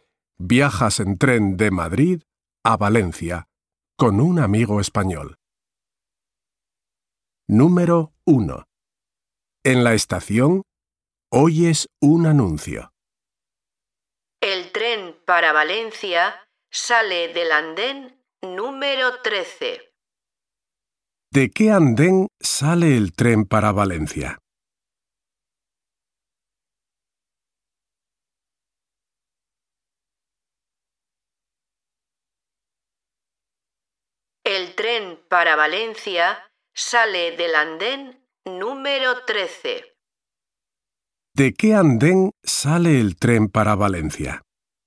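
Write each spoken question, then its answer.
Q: ¿De qué andén sale el tren para Valencia?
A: Del andén número 13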